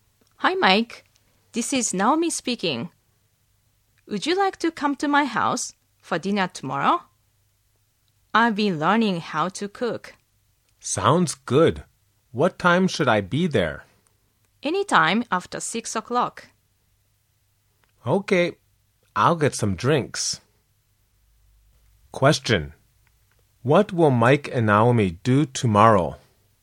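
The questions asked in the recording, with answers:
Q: What will Mike and Naomi do tomorrow?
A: Have dinner at Naomi's house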